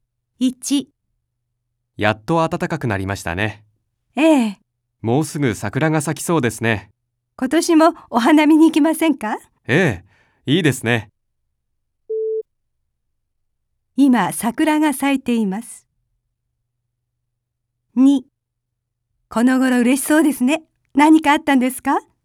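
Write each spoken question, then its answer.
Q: 今桜が咲いています。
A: ×(まだ咲いていない)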